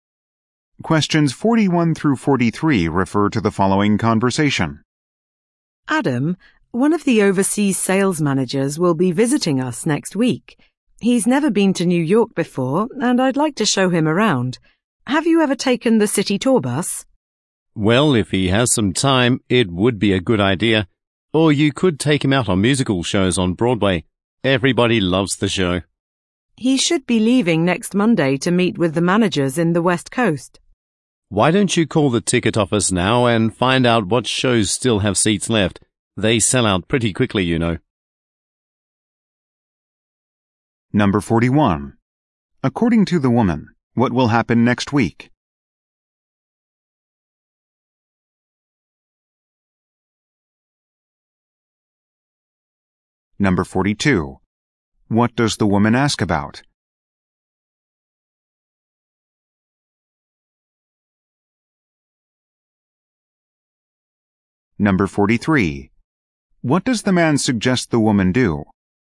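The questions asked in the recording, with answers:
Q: According to the woman, what will happen next week?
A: An overseas sales manager will visit

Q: What does the woman ask about?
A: The city tour bus

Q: What does the man suggest the woman do?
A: Call the ticket office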